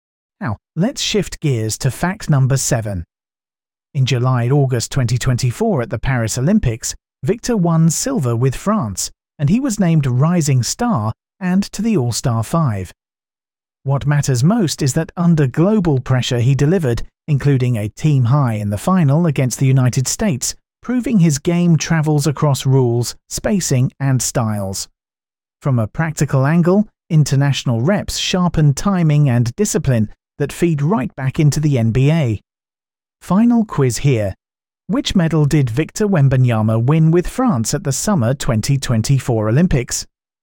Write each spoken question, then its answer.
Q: Which medal did Victor Wembanyama win with France at the Summer 2024 Olympics?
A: Correct answer, silver.